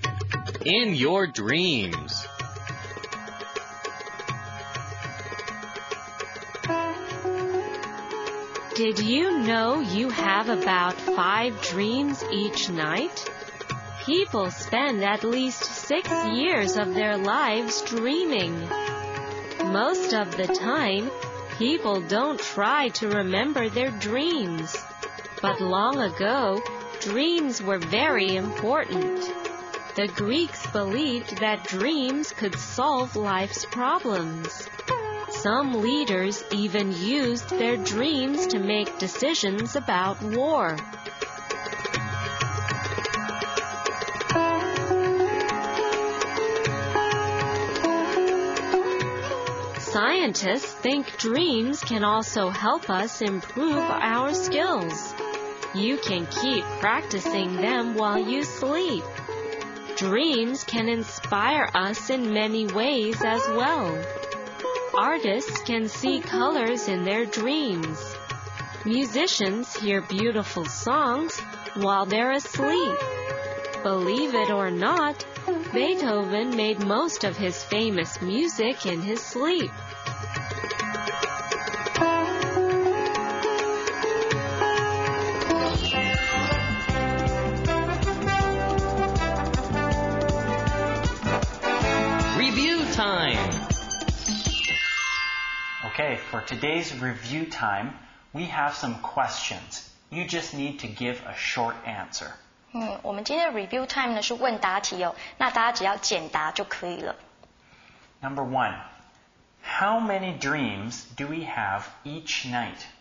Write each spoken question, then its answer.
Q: Number one, how many dreams do we have each night?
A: Well, I think it's about 5.